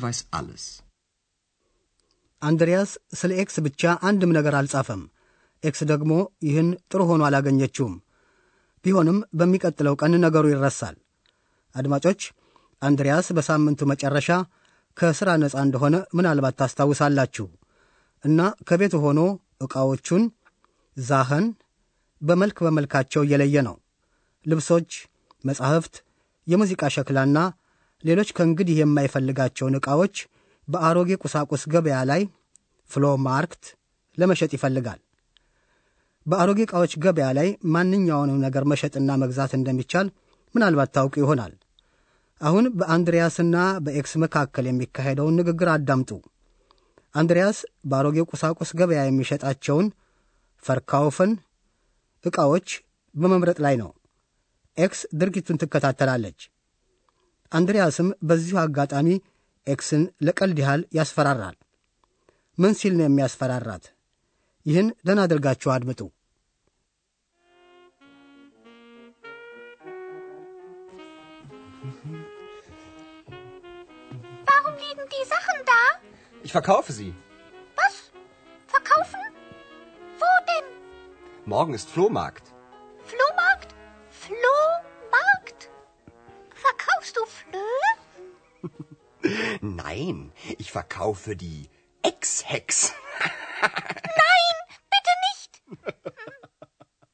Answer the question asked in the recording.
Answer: አንድሪያስ ኤክስን ልክ እንደ ዕቃዎቹ እንደሚሸጣት አድርጎ ያስፈራራል።